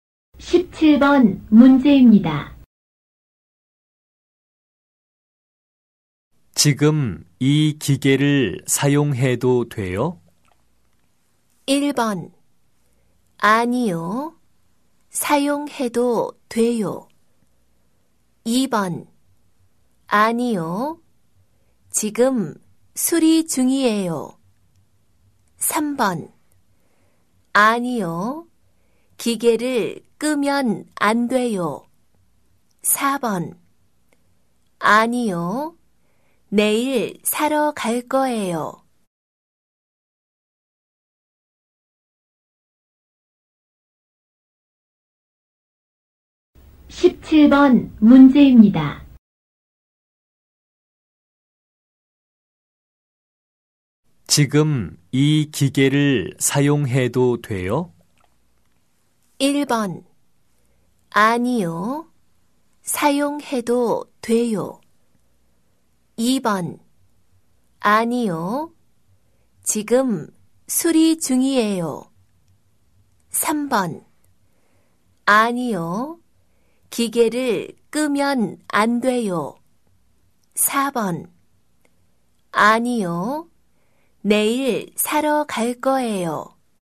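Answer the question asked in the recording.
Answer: 2: 아니요. 지금 수리 중이에요.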